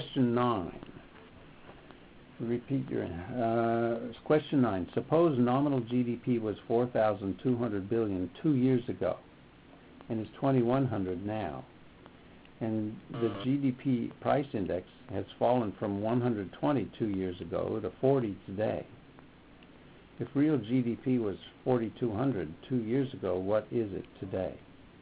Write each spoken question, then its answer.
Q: Suppose nominal GDP was $4,200 billion 2 years ago and is $2,100 now. And the GDP price index has fallen from 120 2 years ago to 40 today. If real GDP was 4,200 2 years ago, what is it today?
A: So the correct answer is 6,300.